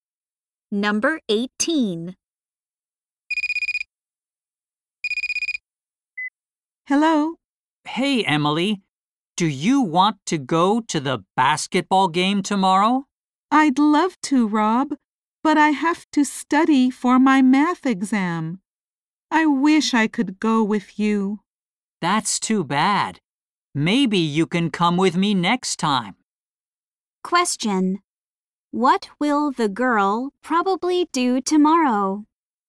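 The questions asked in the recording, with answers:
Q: What will the girl probably do tomorrow?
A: Study for her math exam.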